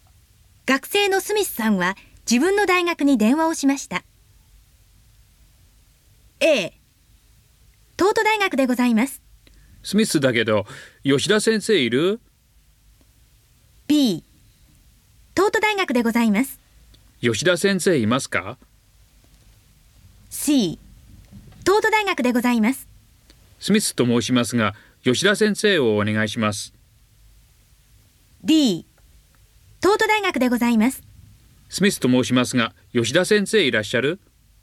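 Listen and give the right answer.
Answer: C: スミスと申しますが吉田先生をお願いします。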